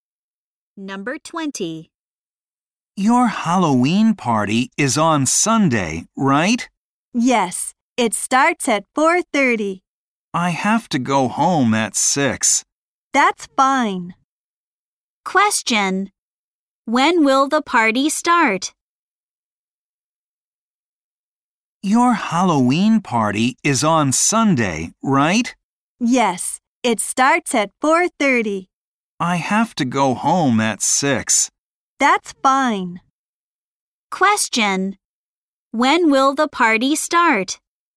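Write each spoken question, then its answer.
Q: Question. When will the party start?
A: At 4:30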